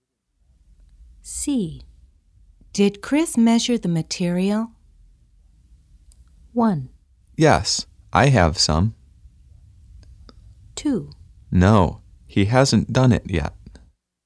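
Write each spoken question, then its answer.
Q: Did Chris measure the material?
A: 2: No, he hasn't done it yet.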